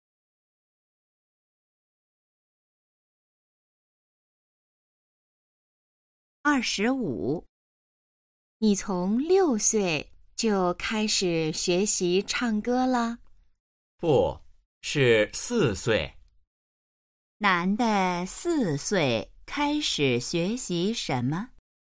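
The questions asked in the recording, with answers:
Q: 男的四岁开始学习什么?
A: 唱歌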